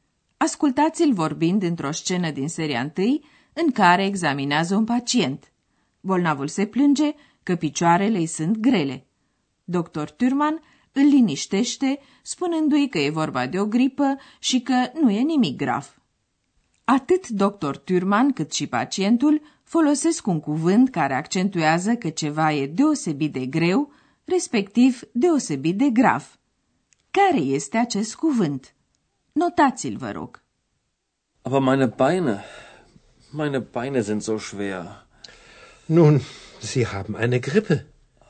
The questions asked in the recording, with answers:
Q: Care este acest cuvânt?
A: Ultimul cuvânt căutat era zo, așa.